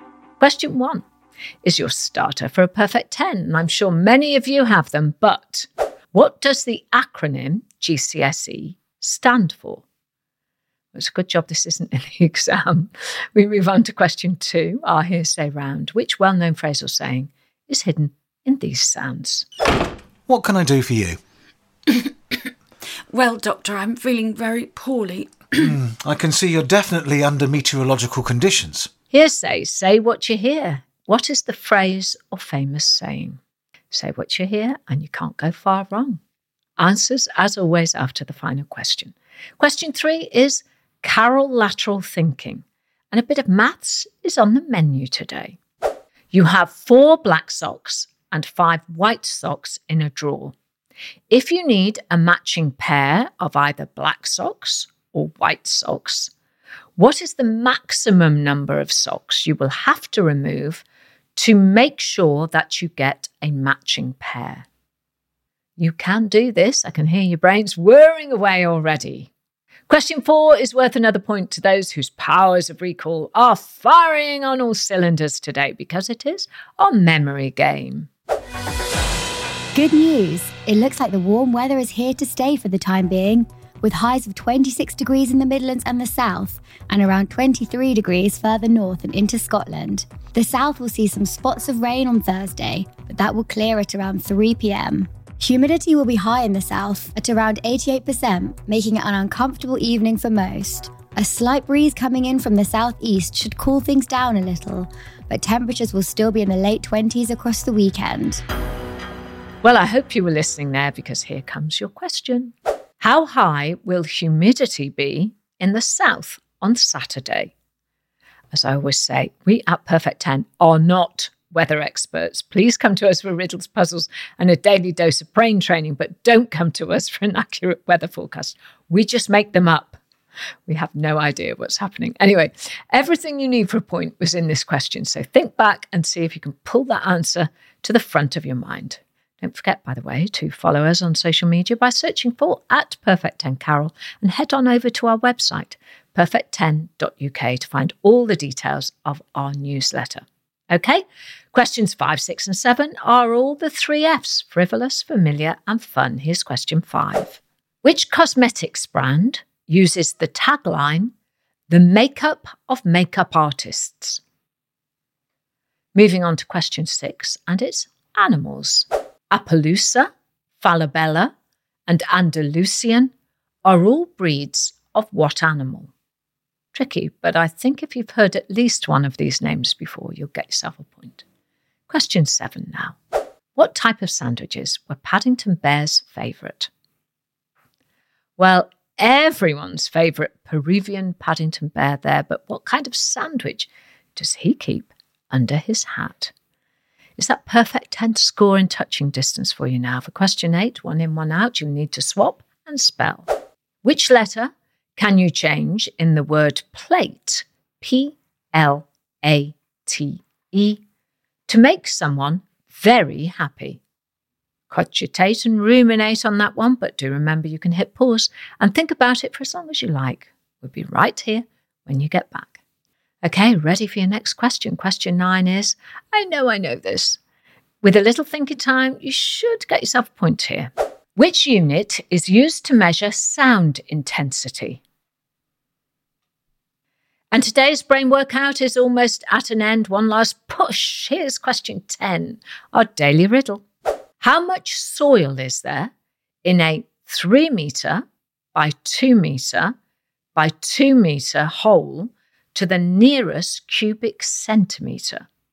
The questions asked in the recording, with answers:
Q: What is the phrase or famous saying?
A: the phrase I was looking for was under the weather.

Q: If you need a matching pair of either black socks or white socks, what is the maximum number of socks you will have to remove to make sure that you get a matching pair?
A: And the answer is three.

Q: How high will humidity be in the south on Saturday?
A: The answer was 88%.

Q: Which letter can you change in the word plate, P L A T E, to make someone very happy?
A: if you change the letter P for a letter E, you get the word elate.

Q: How much soil is there in a three meter by two meter by two meter hole to the nearest cubic centimeter?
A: The answer is there isn't any soil at all.